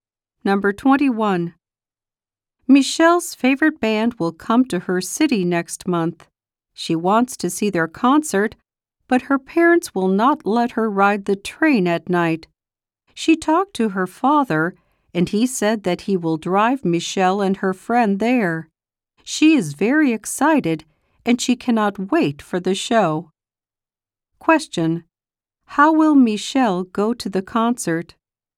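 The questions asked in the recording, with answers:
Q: How will Michelle go to the concert?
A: Her father will drive her.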